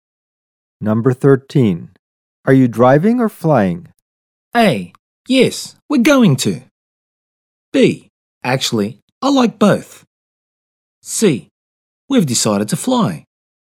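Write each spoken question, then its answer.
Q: Are you driving or flying?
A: C: We've decided to fly.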